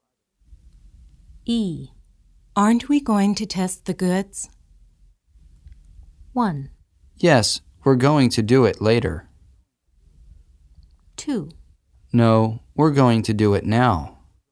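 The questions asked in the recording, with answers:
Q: Aren't we going to test the goods?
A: 1: Yes, we're going to do it later.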